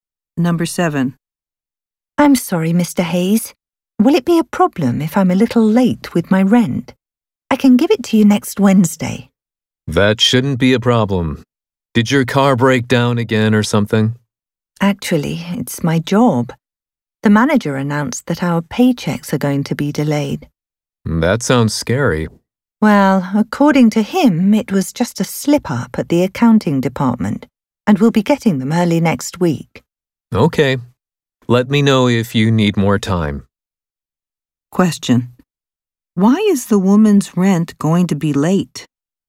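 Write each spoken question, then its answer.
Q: Why is the woman's rent going to be late?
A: Her paycheck has been delayed because of an accounting mistake at work.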